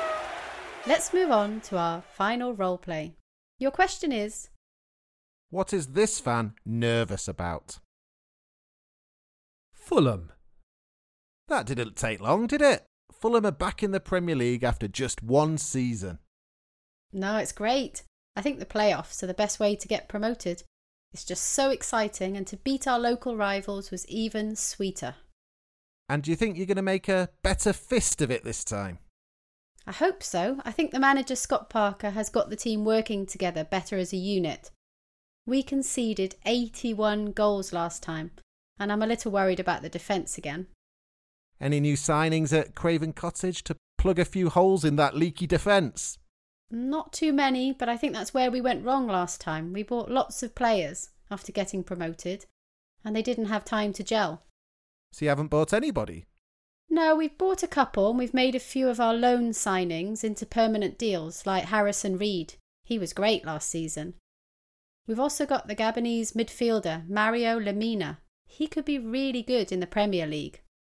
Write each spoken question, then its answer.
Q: what is this fan nervous about?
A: She said she was worried about Fulham's defence.